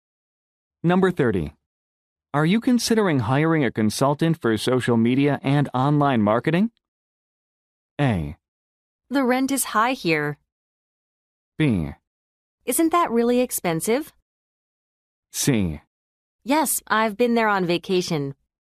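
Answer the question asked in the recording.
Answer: B: Isn't that really expensive?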